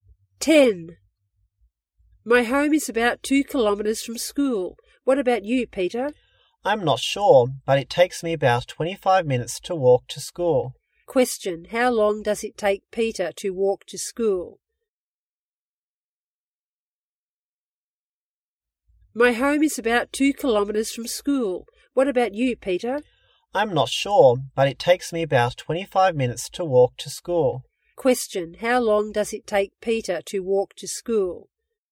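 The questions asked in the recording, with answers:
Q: how long does it take Peter to walk to school?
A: About 25 minutes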